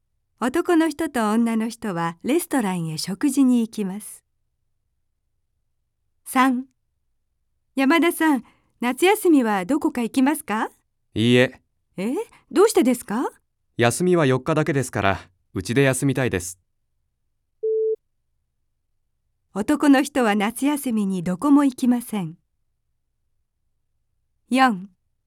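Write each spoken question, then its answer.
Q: 男の人は夏休みにどこも行きません。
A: ○(正しい)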